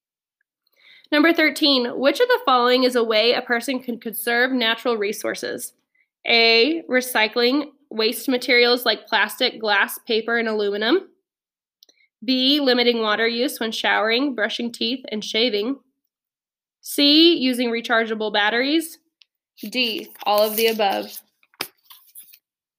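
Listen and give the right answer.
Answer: D: all of the above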